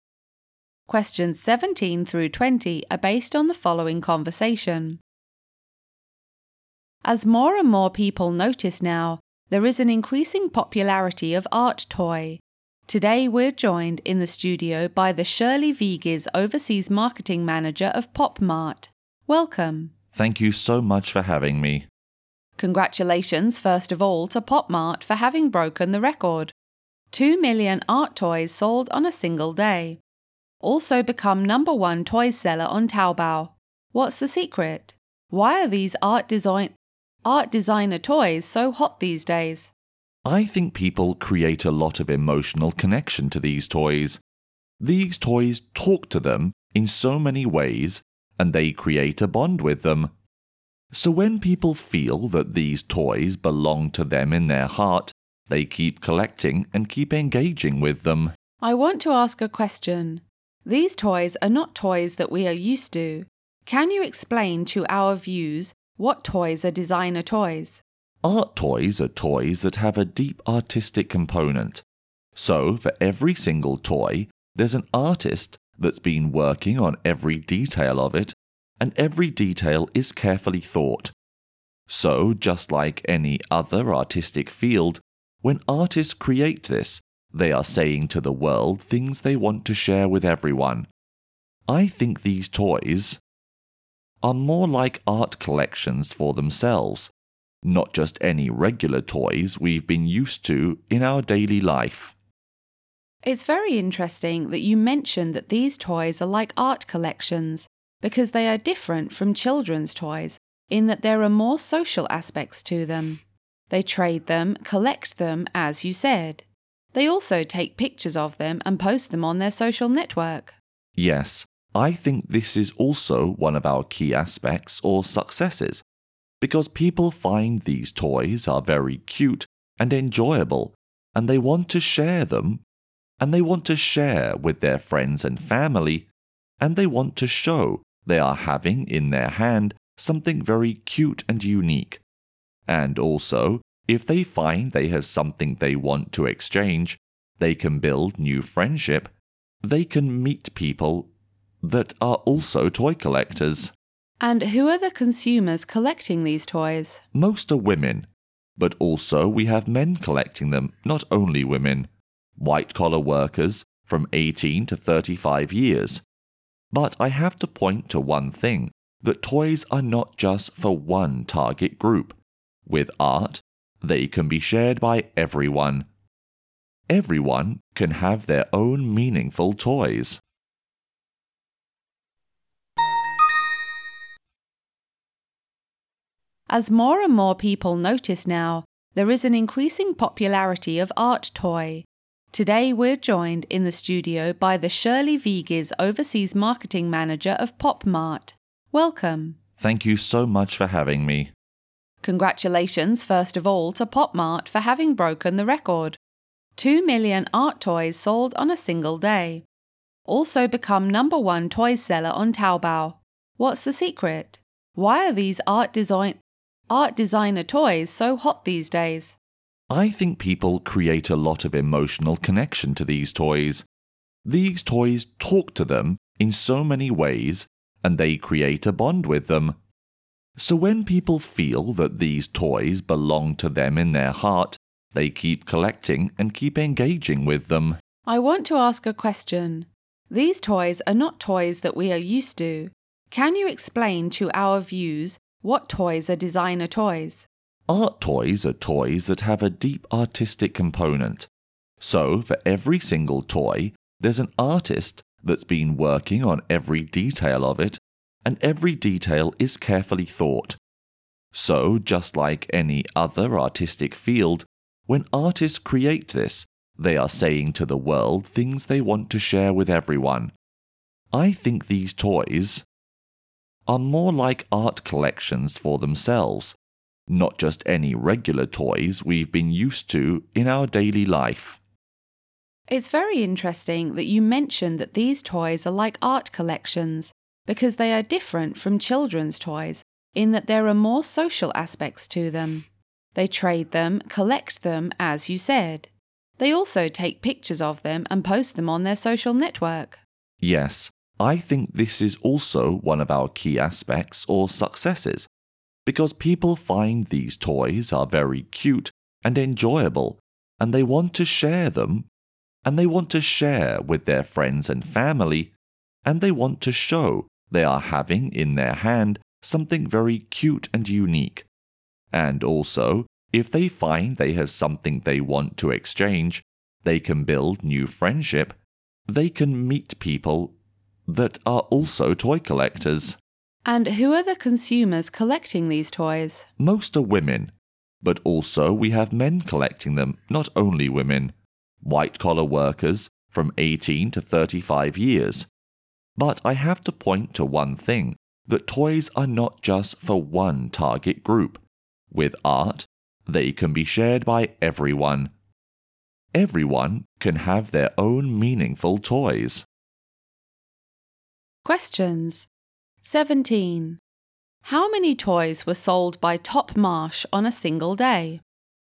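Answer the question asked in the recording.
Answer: 2 million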